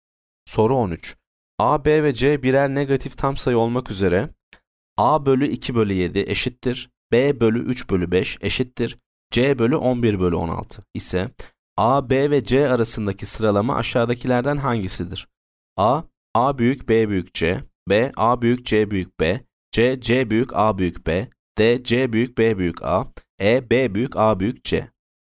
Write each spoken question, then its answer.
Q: A, B ve C birer negatif tam sayı olmak üzere A bölü 2 bölü 7 eşittir B bölü 3 bölü 5 eşittir C bölü 11 bölü 16 ise A, B ve C arasındaki sıralama aşağıdakilerden hangisidir?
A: Yanıt A, A büyük B büyük C.